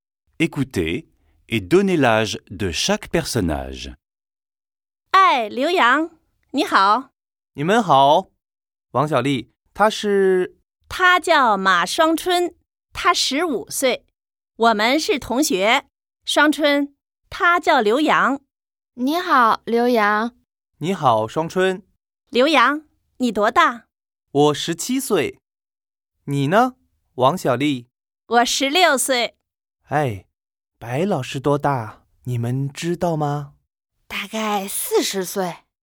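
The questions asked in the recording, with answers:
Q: Écoutez et donnez l'âge de chaque personnage.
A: Ma Shuangchun : 15 ans ; Liu Yang : 17 ans ; Wang Xiaoli : 16 ans ; le professeur Bai : environ 40 ans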